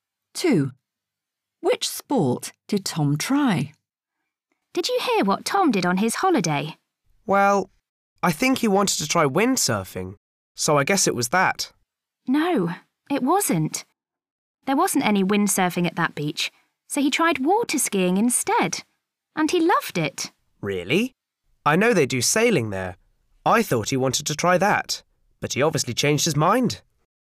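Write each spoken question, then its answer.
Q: Which sport did Tom try?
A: water skiing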